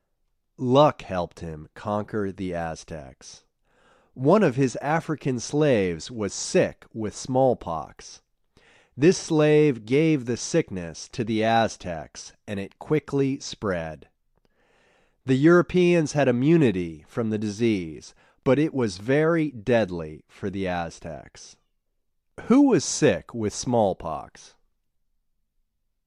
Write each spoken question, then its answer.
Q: Who was sick with smallpox?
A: One of Cortez's African slaves was sick with smallpox.